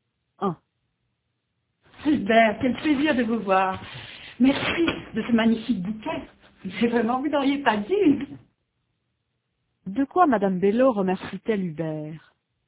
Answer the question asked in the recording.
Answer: De son bouquet.